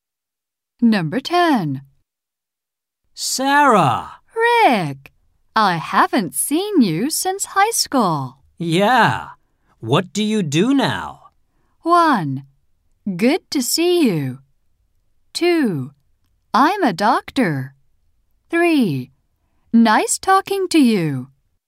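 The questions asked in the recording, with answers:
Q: Yeah. What do you do now?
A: 2: I'm a doctor.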